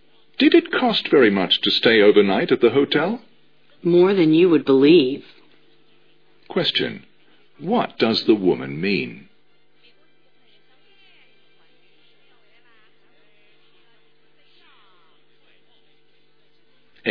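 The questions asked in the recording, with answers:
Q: What does the woman mean?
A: The hotel was very expensive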